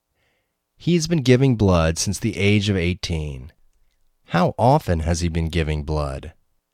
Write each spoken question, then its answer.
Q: How often has he been giving blood?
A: He has been giving blood nearly every week.